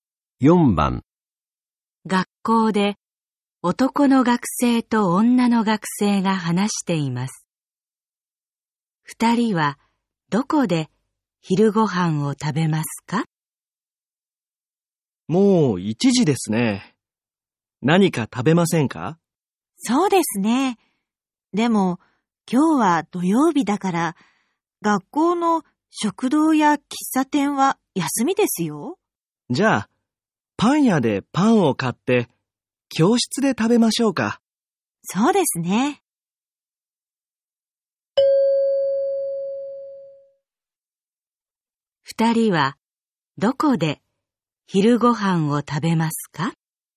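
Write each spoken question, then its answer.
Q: 二人はどこで昼ご飯を食べますか?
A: 教室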